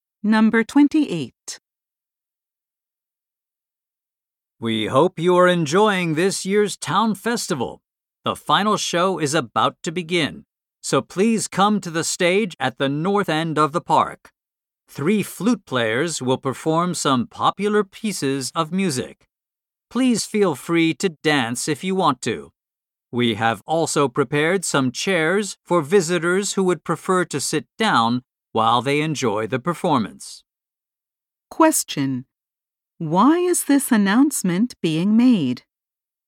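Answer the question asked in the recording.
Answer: The final show is about to begin.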